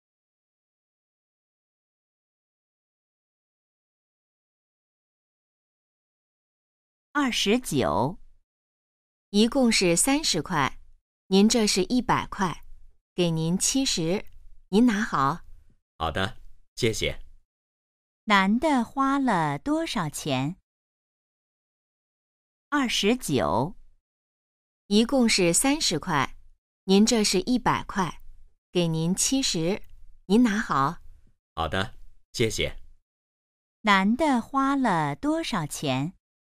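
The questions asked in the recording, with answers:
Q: 男的花了多少钱?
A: 30块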